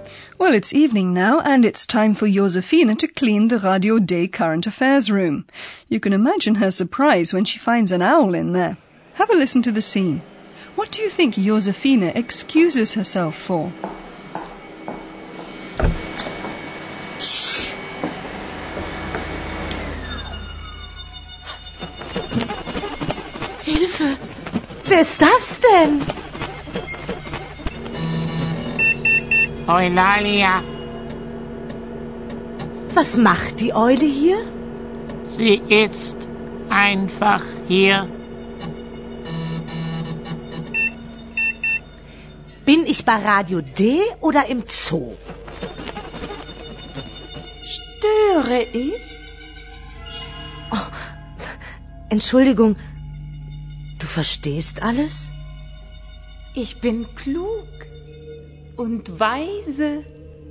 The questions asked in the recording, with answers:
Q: What do you think Josefina excuses herself for?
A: Realizing that Eulalia can not only speak but apparently understands everything too, Josephine excuses herself.